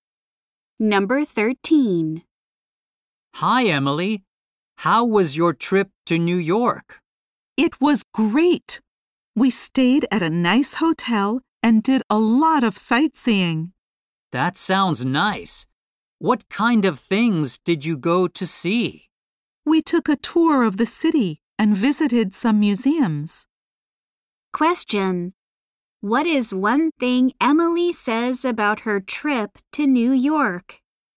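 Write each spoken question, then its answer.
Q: What is one thing Emily says about her trip to New York?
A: She took a city tour and visited museums.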